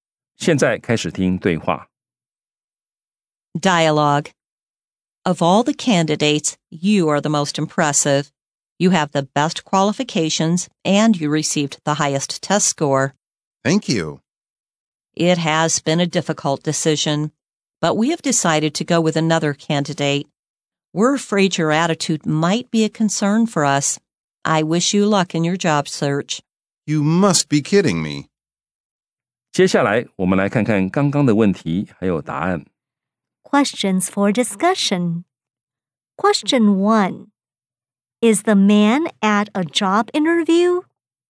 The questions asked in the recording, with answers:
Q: Is the man at a job interview?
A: Answer. Yes, he is at a job interview.